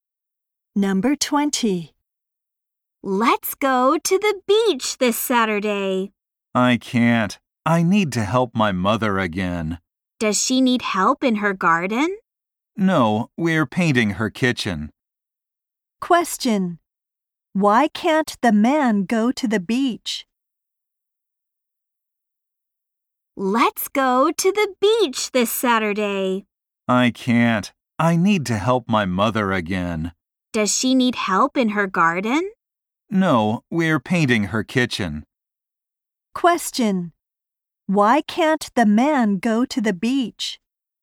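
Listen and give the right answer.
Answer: He has to help his mother paint her kitchen.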